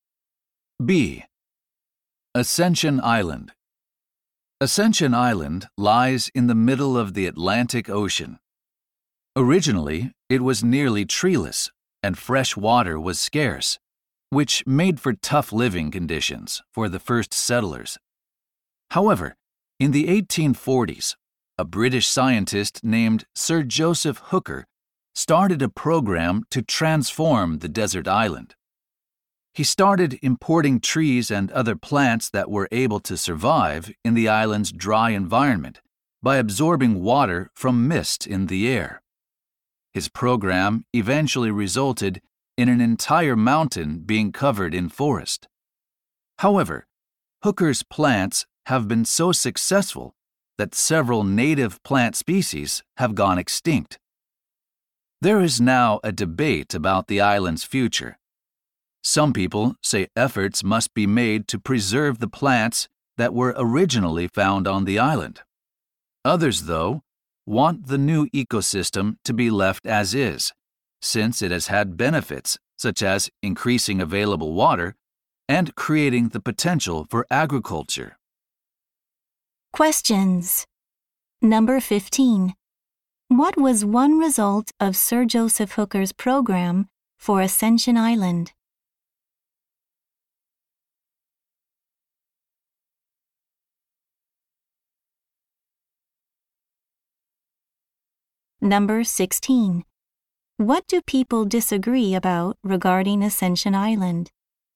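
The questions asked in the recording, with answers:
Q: What was one result of Sir Joseph Hooker's program for Ascension Island?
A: Several native plant species went extinct.

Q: What do people disagree about regarding Ascension Island?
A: Whether to preserve the original plants or leave the new ecosystem as it is.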